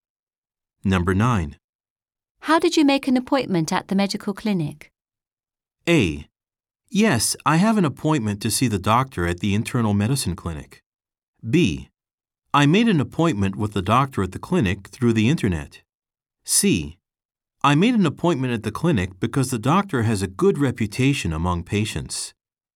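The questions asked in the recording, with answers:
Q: How did you make an appointment at the medical clinic?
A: B: I made an appointment with the doctor at the clinic through the internet.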